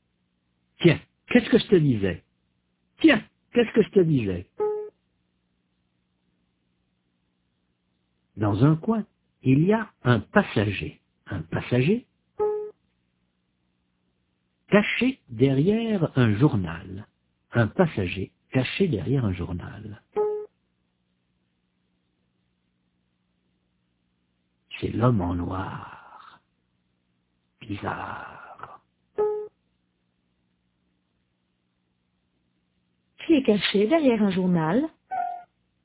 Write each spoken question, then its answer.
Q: Qui est caché derrière un journal?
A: L'homme en noir.